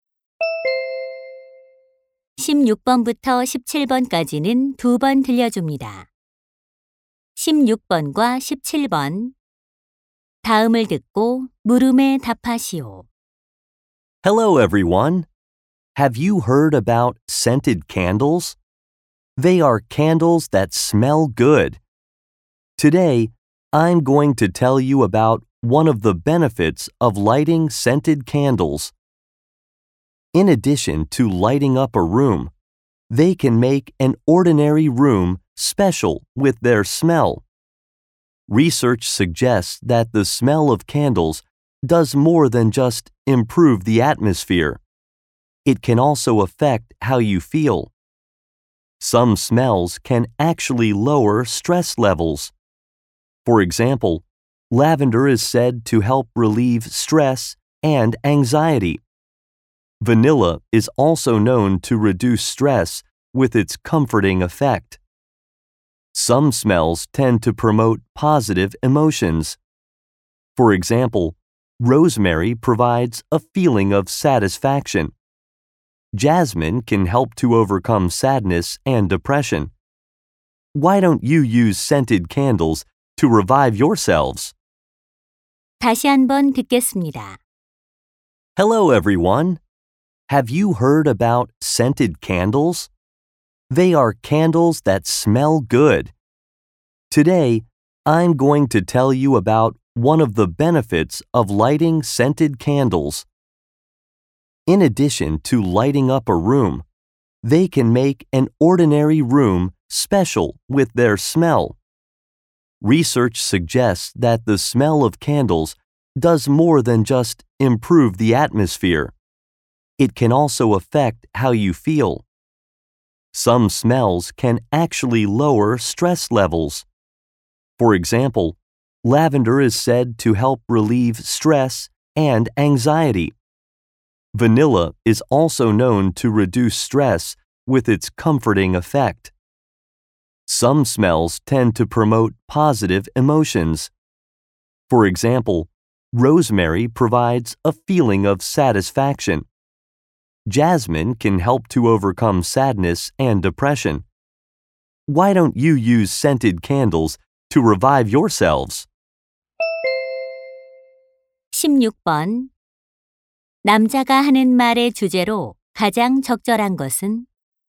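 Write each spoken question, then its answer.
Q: 남자가 하는 말의 주제로 가장 적절한 것은?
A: 향초의 향이 감정에 미치는 영향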